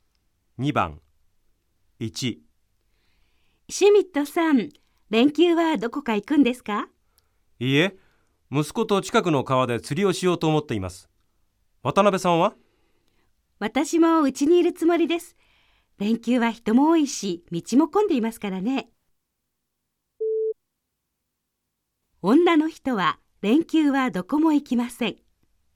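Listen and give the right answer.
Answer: ○(正しい)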